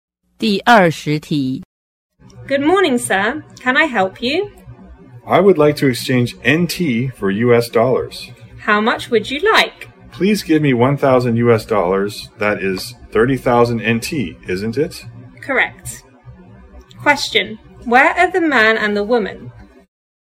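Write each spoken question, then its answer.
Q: Where are the man and the woman?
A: At a bank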